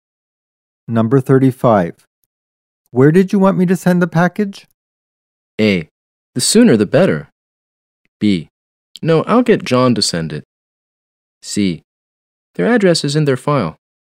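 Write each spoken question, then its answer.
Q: Where did you want me to send the package?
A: C: Their address is in their file.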